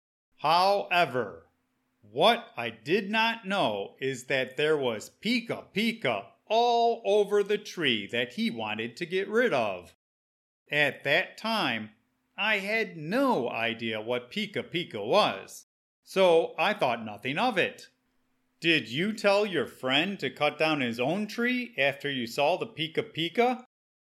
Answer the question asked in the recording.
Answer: No. At the time, I had no idea what pica pica was, so I thought nothing of it.